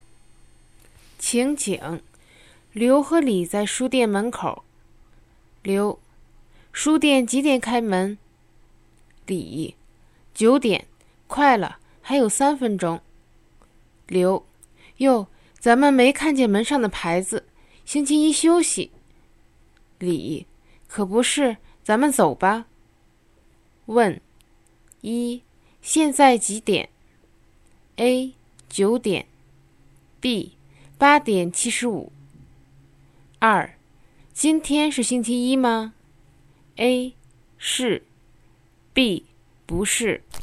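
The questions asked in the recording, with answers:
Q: 今天是星期一吗?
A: A: 是。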